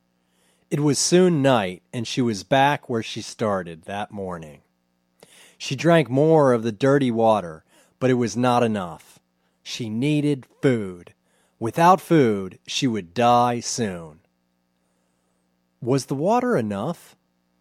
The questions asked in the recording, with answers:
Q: Was the water enough?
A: No, it wasn't enough. She needed food.